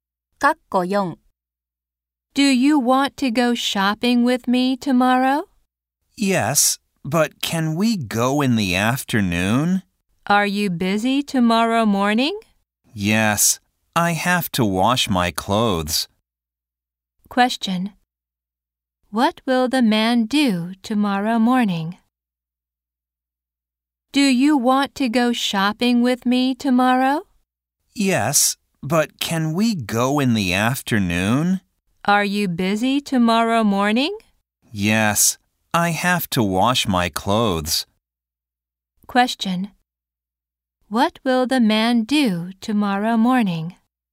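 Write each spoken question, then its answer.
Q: What will the man do tomorrow morning?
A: Wash his clothes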